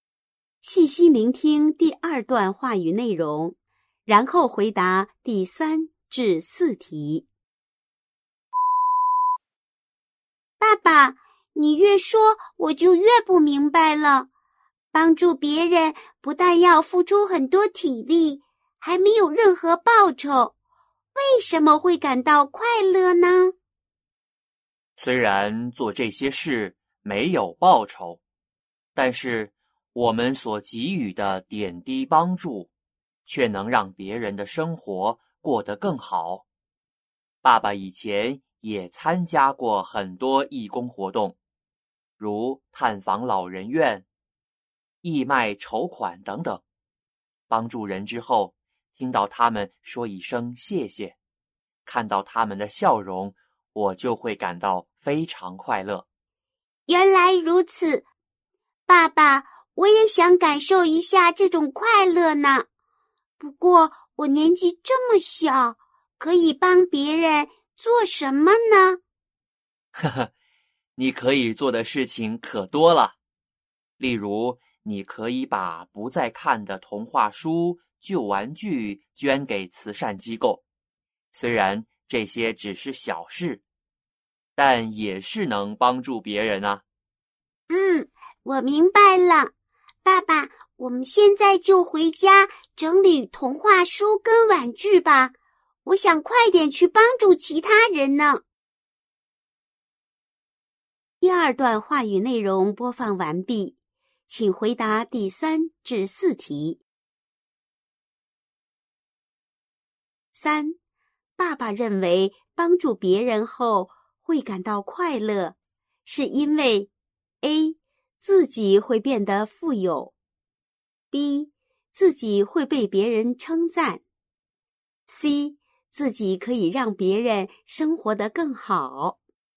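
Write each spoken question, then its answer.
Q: 爸爸认为帮助别人后会感到快乐,是因为 A. 自己会变得富有, B. 自己会被别人称赞, C. 自己可以让别人生活得更好。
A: C: 自己可以让别人生活得更好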